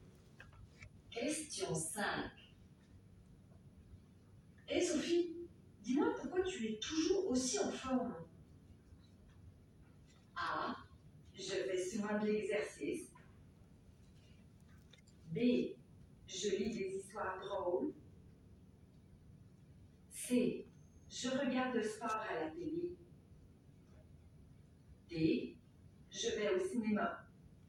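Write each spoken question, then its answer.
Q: Hé Sophie, dis-moi pourquoi tu es toujours aussi en forme?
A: A: Je fais souvent de l'exercice.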